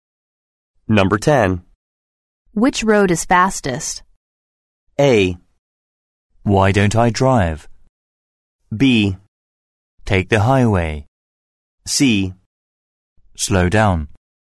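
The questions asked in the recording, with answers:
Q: Which road is fastest?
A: B: Take the highway.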